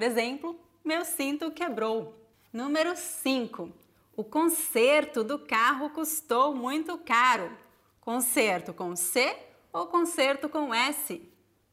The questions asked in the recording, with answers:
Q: Conserto com C ou conserto com S?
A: Conserto com S.